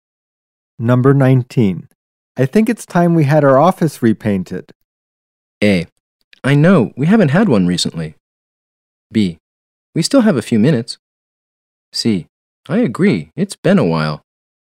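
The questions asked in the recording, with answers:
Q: I think it's time we had our office repainted.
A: C: I agree, it's been a while.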